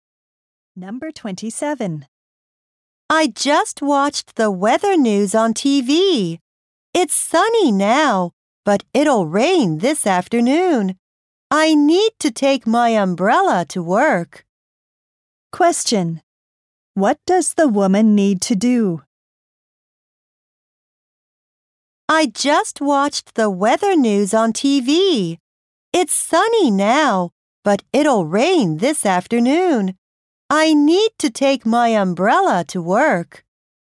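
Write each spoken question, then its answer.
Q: Question. What does the woman need to do?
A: Take her umbrella to work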